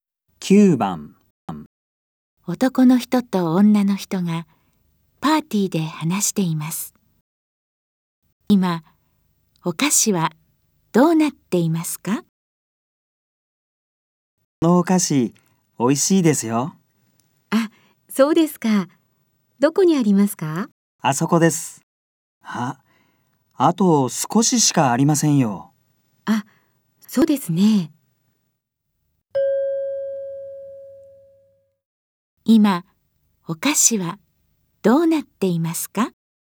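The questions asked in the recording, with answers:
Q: 今、お菓子はどうなっていますか?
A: あと少ししかない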